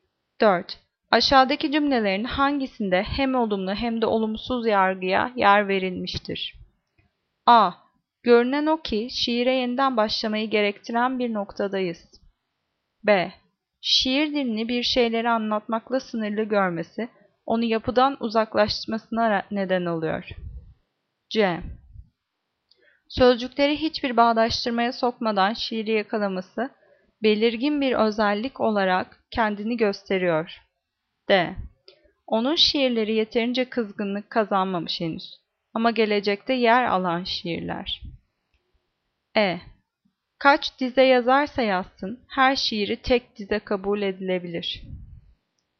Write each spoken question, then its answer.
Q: Aşağıdaki cümlelerin hangisinde hem olumlu hem de olumsuz yargıya yer verilmiştir?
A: Cevap D. Onun şiirleri yeterince yaygınlık kazanmamış henüz.